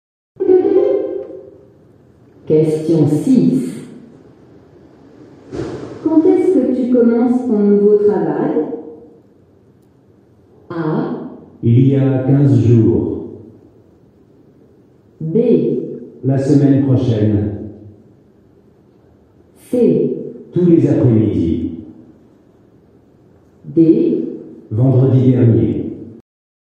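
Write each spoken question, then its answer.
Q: Quand est-ce que tu commences ton nouveau travail?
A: B: La semaine prochaine.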